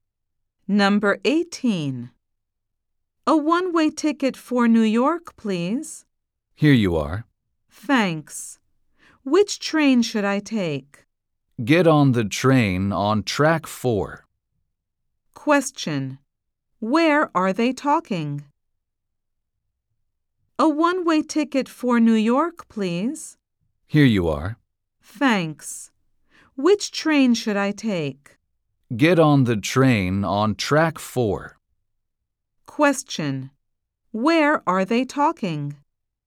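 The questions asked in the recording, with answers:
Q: Where are they talking?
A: At a train station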